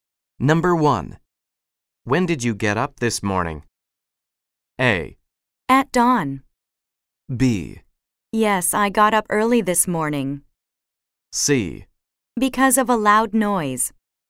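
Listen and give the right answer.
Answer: A: At dawn.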